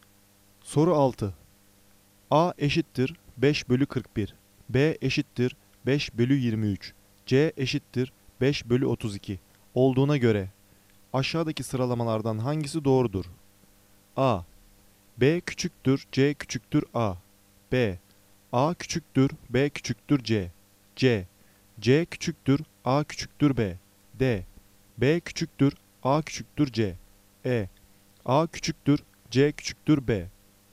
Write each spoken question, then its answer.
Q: A eşittir 5 bölü 41, B eşittir 5 bölü 23, C eşittir 5 bölü 32 olduğuna göre aşağıdaki sıralamalardan hangisi doğrudur?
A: Doğru cevap E. A küçüktür, C küçüktür, B.